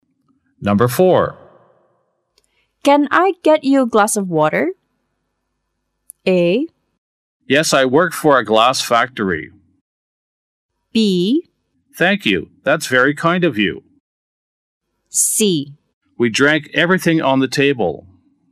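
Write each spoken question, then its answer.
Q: Can I get you a glass of water?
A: B: Thank you. That's very kind of you.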